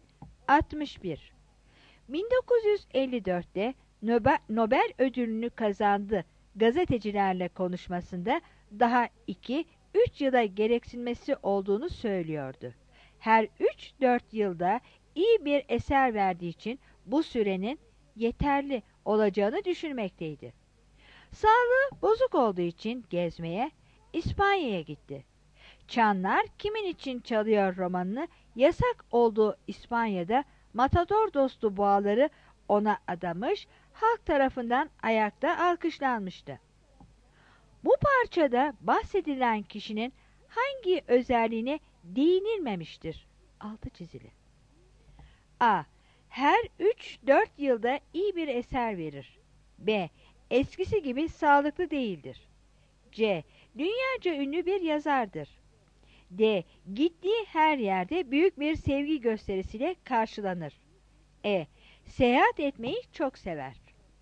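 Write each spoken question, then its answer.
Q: Bu parçada bahsedilen kişinin hangi özelliğine değinilmemiştir?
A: E: Seyahat etmeyi çok sever.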